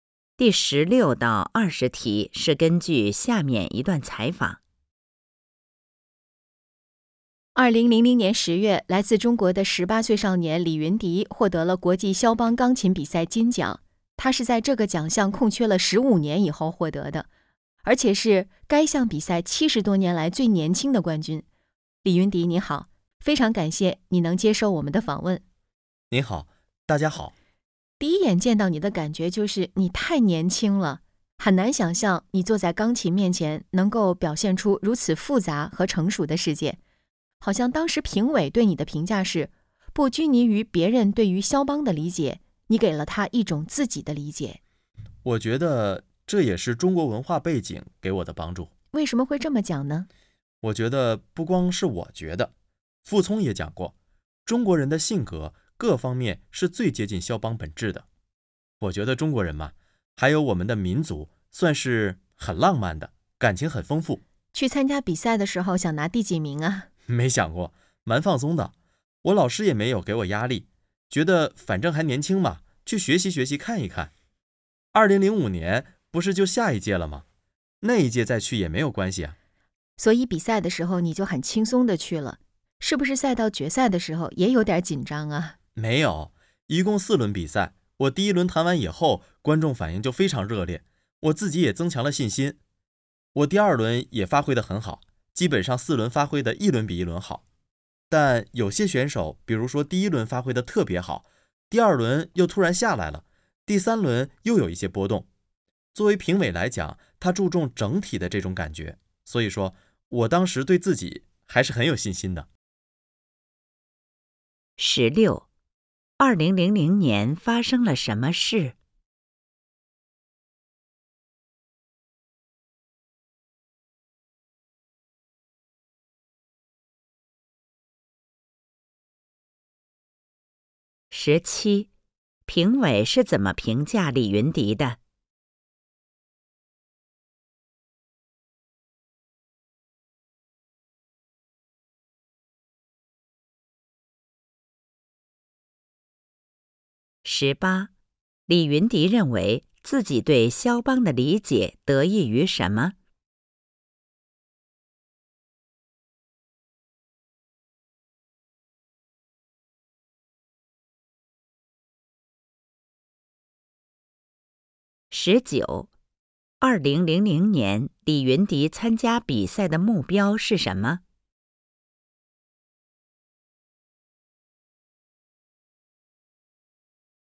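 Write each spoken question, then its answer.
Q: 2000年发生了什么事?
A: 李云迪获得国际肖邦钢琴比赛金奖

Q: 评委是怎么评价李云迪的?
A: 不拘泥于别人对肖邦的理解,给了自己的理解

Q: 李云迪认为自己对肖邦的理解得益于什么?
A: 中国文化背景

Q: 2000年,李云迪参加比赛的目标是什么?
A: 没想拿第几名,只是去学习看看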